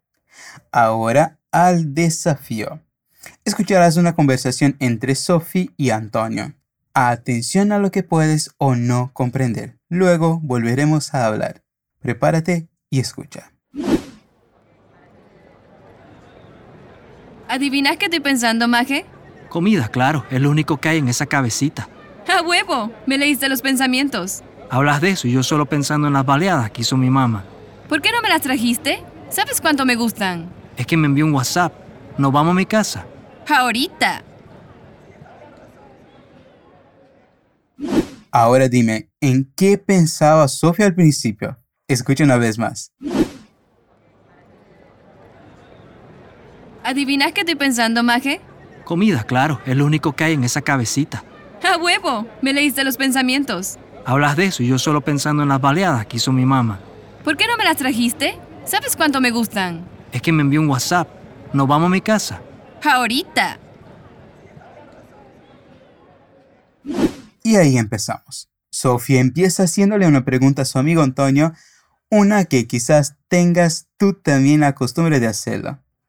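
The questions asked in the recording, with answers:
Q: Ahora dime, ¿en qué pensaba Sofía al principio?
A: En comida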